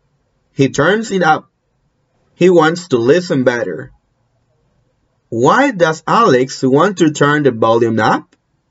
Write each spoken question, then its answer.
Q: Why does Alex want to turn the volume up?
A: Because he wants to listen better.